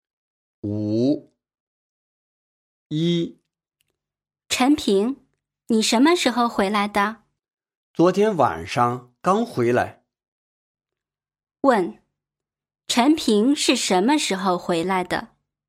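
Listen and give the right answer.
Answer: 昨天晚上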